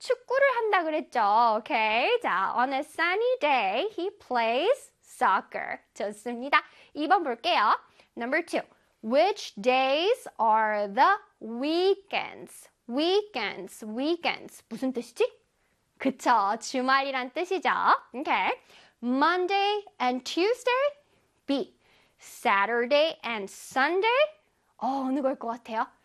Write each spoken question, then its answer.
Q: Which days are the weekends?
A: Saturday and Sunday가 되겠죠.